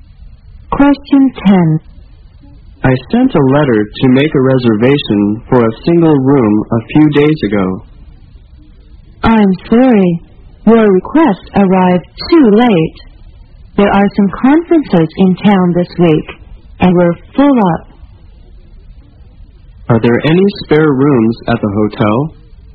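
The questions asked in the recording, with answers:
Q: Are there any spare rooms at the hotel?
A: No, the hotel is full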